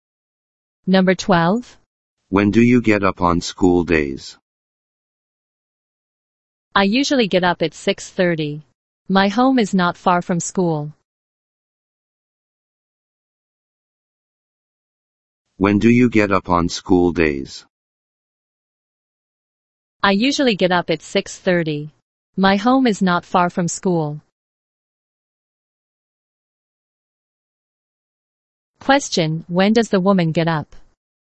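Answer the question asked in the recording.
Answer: At 6:30.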